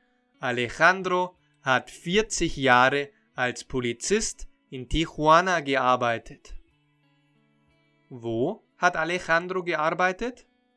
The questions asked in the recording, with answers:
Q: Wo hat Alejandro gearbeitet?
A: Nein, er hat nicht in Guadalajara gearbeitet, sondern in Tijuana.